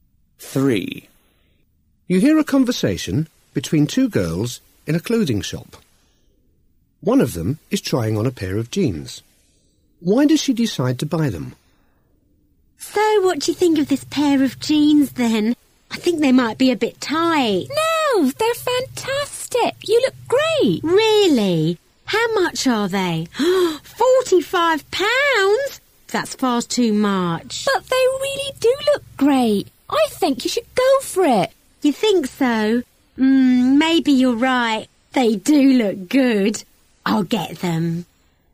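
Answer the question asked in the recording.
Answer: Her friend says they look great on her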